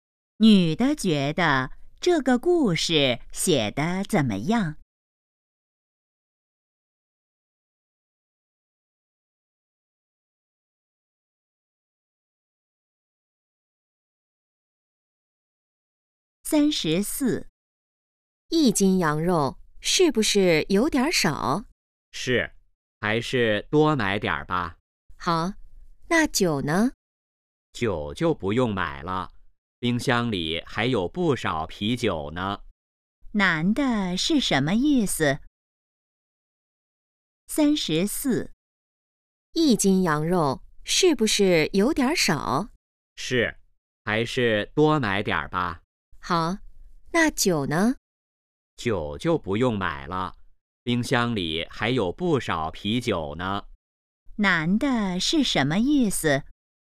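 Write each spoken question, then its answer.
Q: 男的是什么意思?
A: 不用买酒了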